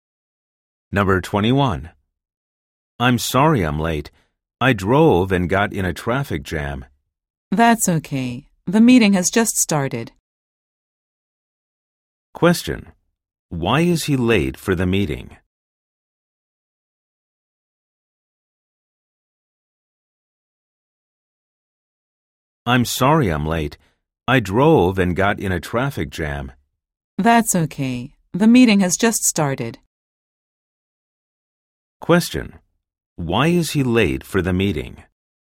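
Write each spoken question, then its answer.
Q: Why is he late for the meeting?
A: He drove and got caught in a traffic jam.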